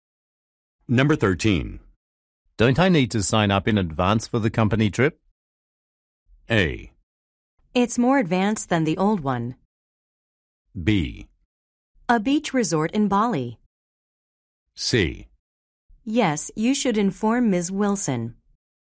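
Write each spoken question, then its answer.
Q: Don't I need to sign up in advance for the company trip?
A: C: Yes, you should inform Ms. Wilson.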